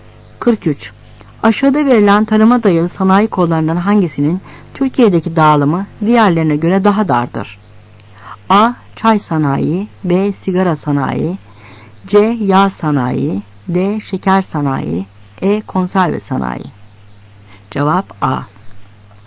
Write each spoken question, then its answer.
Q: Aşağıda verilen tarıma dayalı sanayi kollarından hangisinin Türkiye'deki dağılımı diğerlerine göre daha dardır?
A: Cevap A.